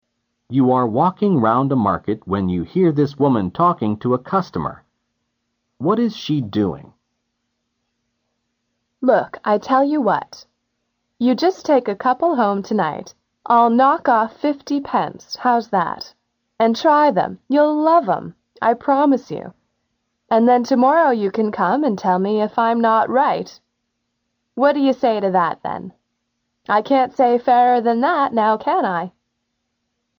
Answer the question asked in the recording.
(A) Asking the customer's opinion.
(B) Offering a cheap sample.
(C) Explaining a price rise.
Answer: (B) Offering a cheap sample.

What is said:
You are walking round the market when you hear this woman talking to a customer. What is she doing?
Look, I'll tell you what. You just take a couple home tonight. I'll knock off 50 pence. How's that? And try them, you'll love them. I promise you. And then tomorrow you can come and tell me if I'm not right. What do you say to that then?